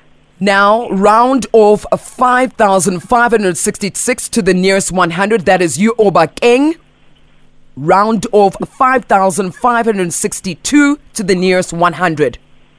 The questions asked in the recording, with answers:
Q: Round off 5,562 to the nearest 100.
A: rounding off 5,562 to the nearest 100 is 5,600.